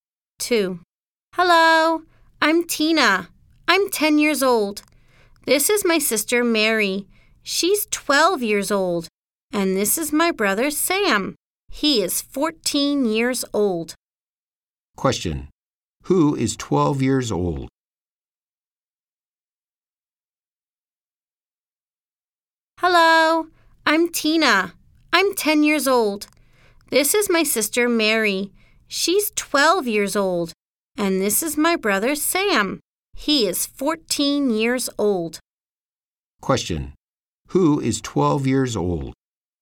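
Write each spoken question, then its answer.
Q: Who is 12 years old?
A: Mary, Tina's sister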